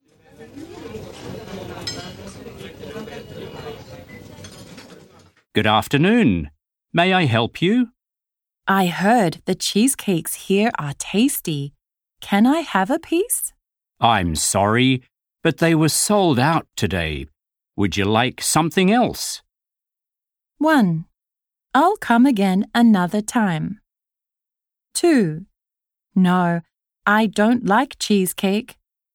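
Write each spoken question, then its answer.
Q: Would you like something else?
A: 1: I'll come again another time.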